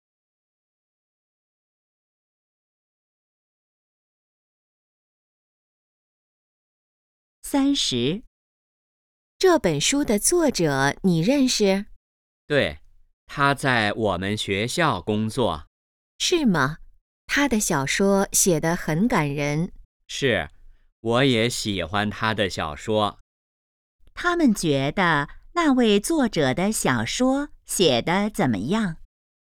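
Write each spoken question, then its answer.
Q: 他们觉得那位作者的小说写得怎么样?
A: 很感人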